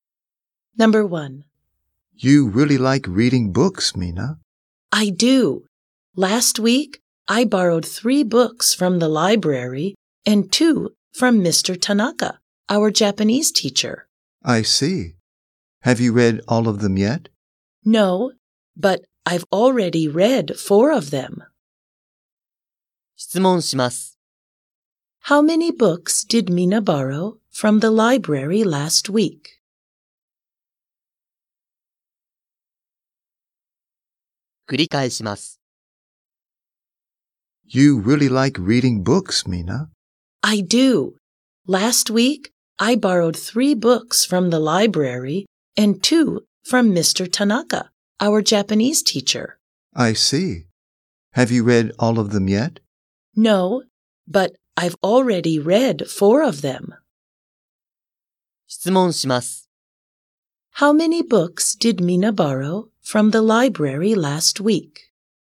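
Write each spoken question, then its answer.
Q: How many books did Mina borrow from the library last week?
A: Three.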